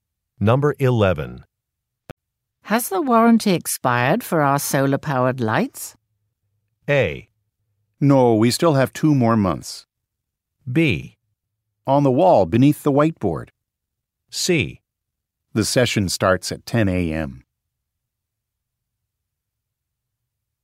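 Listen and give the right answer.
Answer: A: No, we still have 2 more months.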